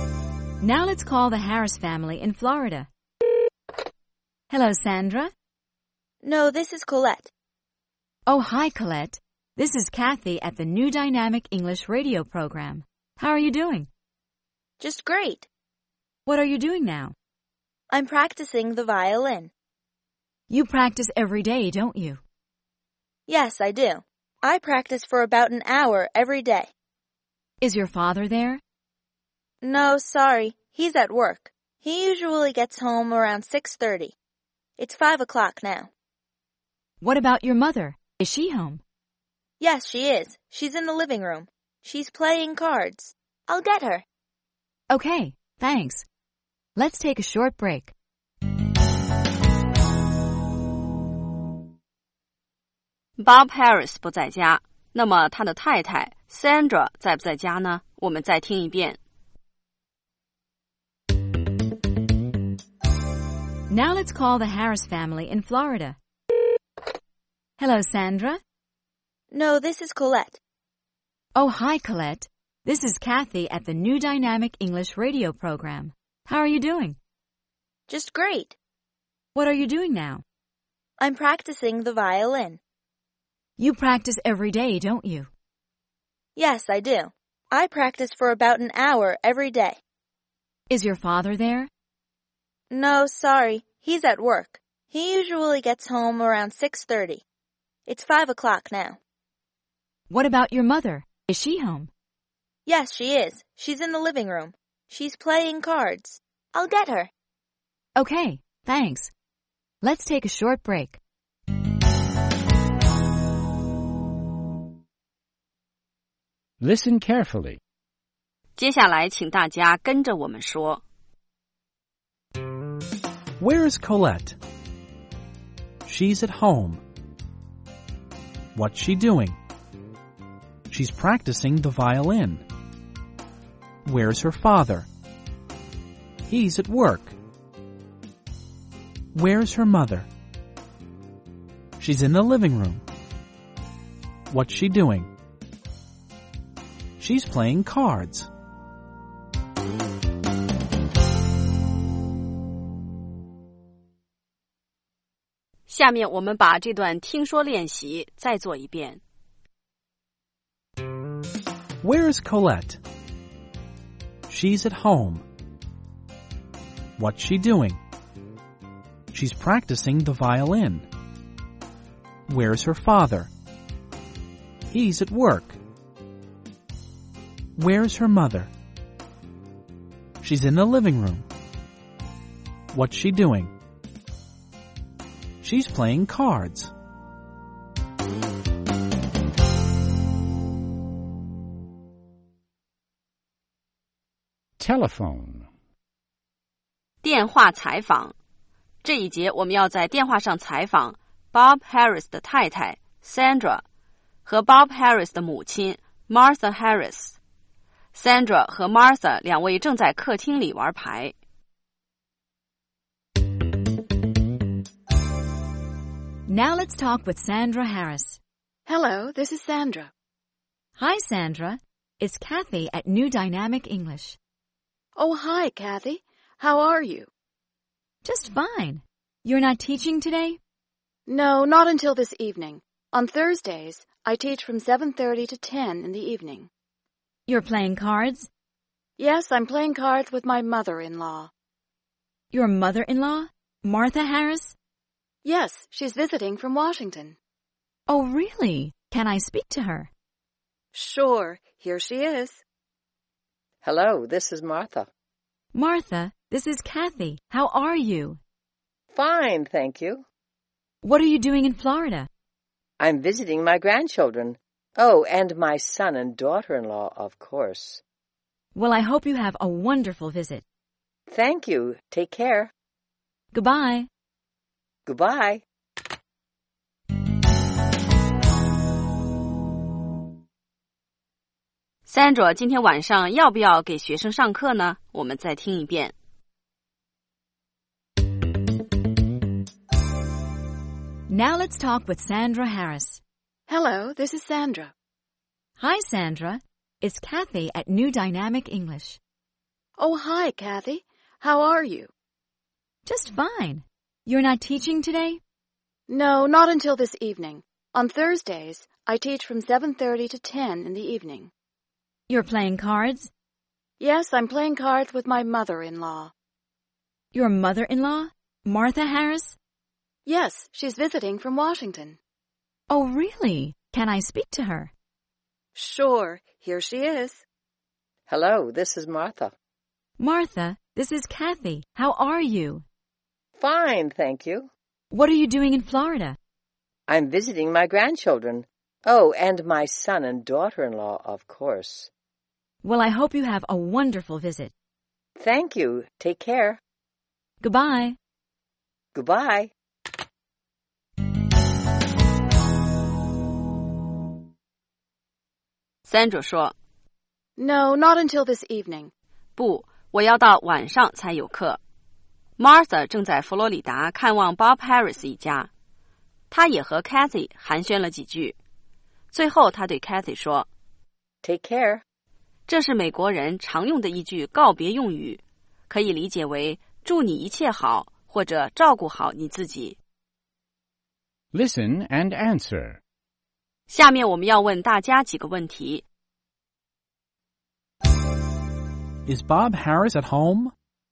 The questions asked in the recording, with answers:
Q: Is Bob Harris at home?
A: No, he isn't. He's at work.